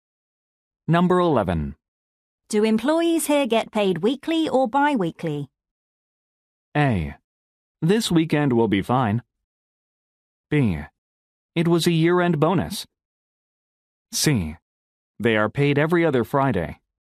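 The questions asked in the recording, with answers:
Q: Do employees here get paid weekly or bi-weekly?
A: C: They are paid every other Friday.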